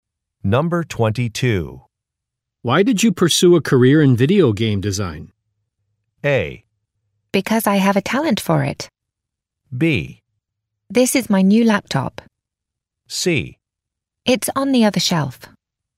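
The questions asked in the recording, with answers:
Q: Why did you pursue a career in video game design?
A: A: Because I have a talent for it.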